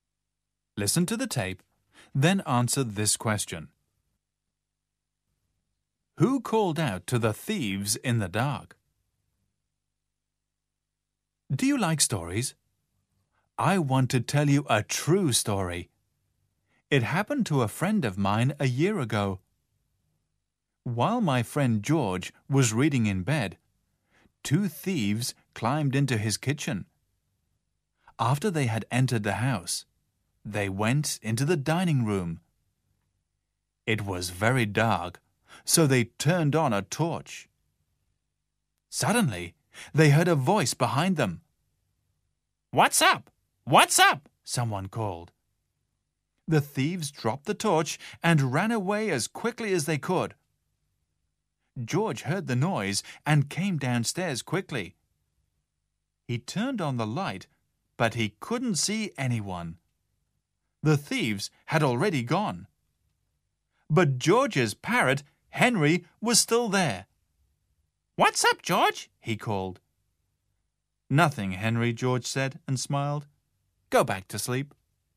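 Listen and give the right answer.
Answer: George's parrot, Henry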